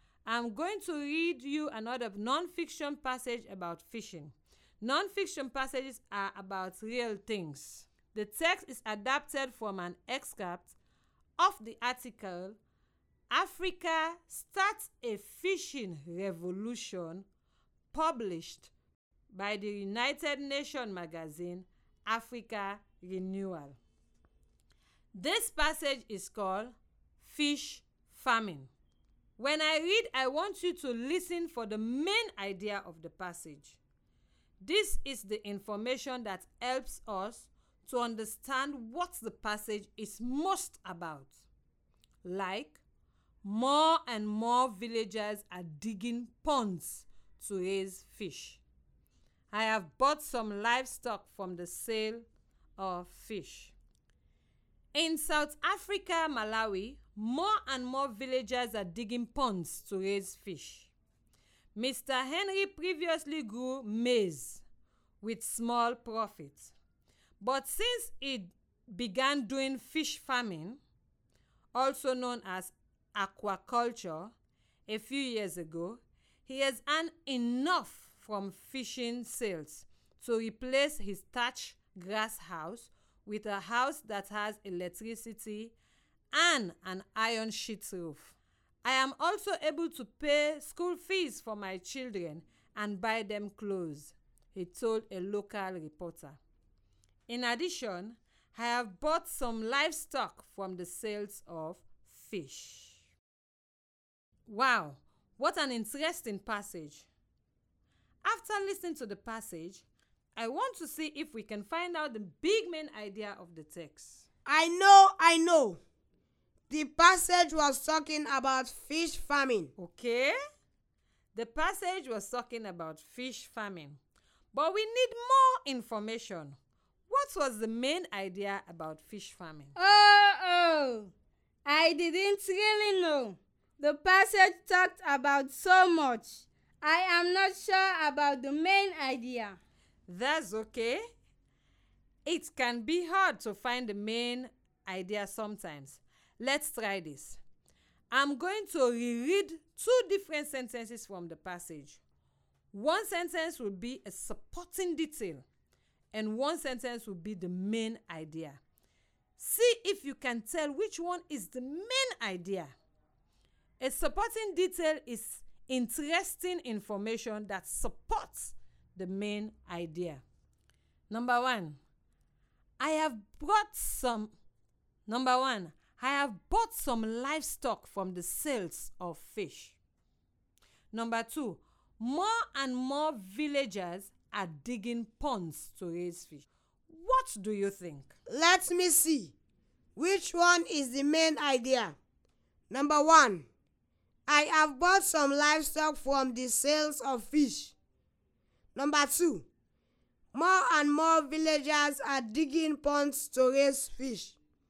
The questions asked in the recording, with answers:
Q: Which one is the main idea?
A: Sentence number two is the main idea.